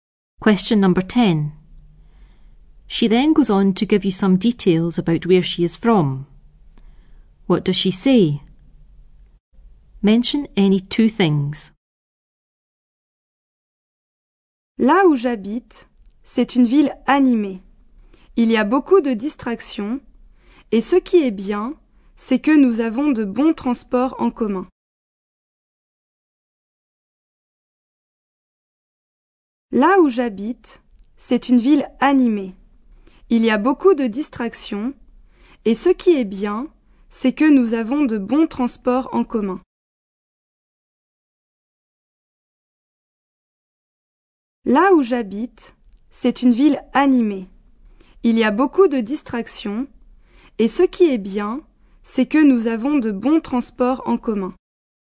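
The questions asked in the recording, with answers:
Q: What does she say? Mention any two things.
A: Lively town, lots of entertainment, good public transport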